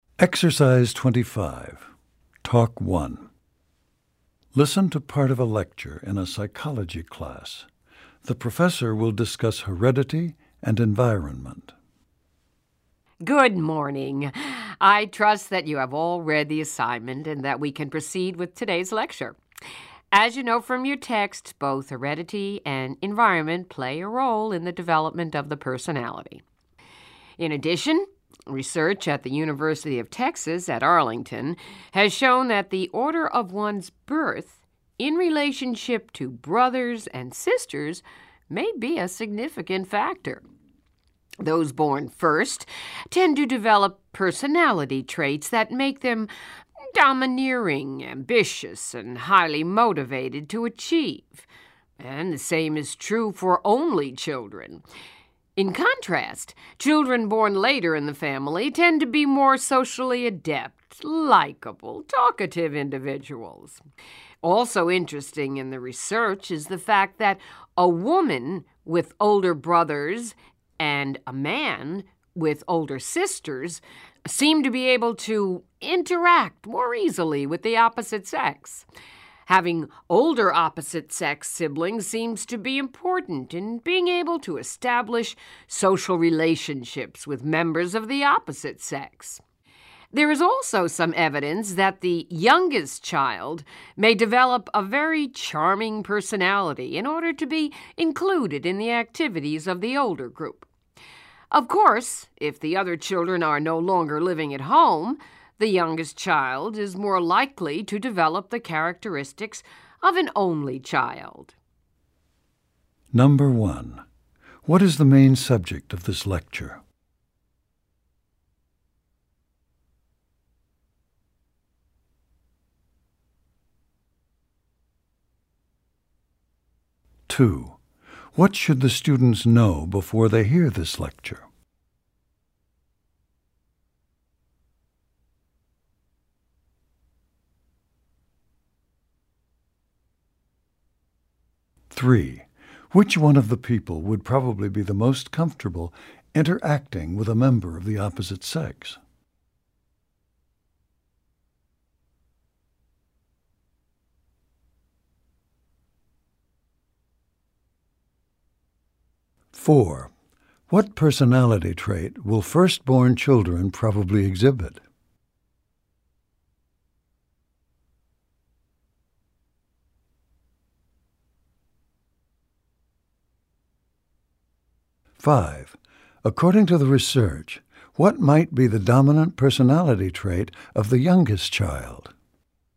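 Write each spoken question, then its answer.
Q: What is the main subject of this lecture?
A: How birth order affects personality

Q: Which one of the people would probably be the most comfortable interacting with a member of the opposite sex?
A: A woman with older brothers (or a man with older sisters)

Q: What personality trait will firstborn children probably exhibit?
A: Ambition (domineering, highly motivated to achieve)

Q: According to the research, what might be the dominant personality trait of the youngest child?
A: Charm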